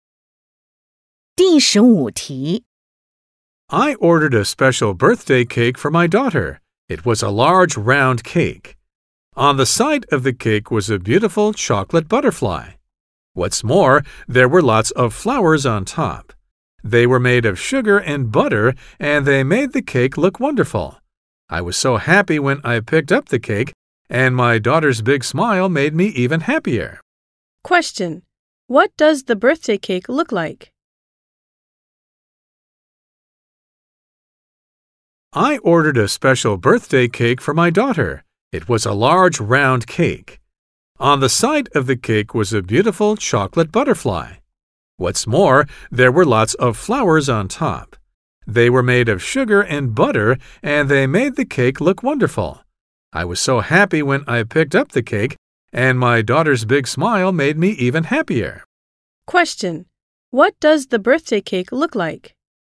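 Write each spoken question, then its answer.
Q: What does the birthday cake look like?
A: A large round cake with a chocolate butterfly on the side and sugar flowers on top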